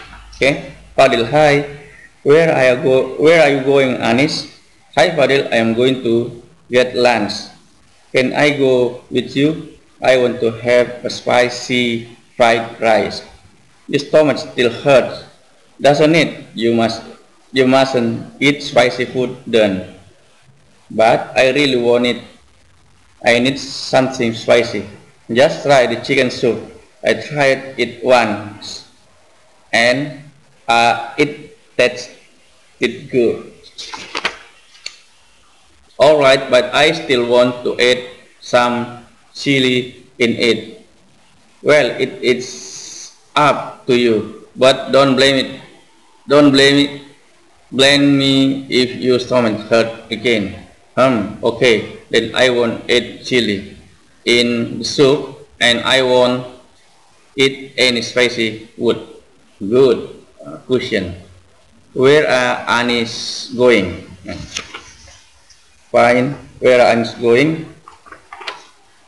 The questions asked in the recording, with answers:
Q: Where are Anis going?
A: Anis going to get lunch.